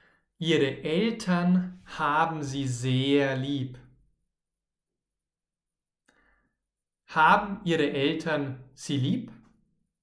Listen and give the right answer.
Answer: Ja, natürlich. Ihre Eltern haben sie sehr lieb.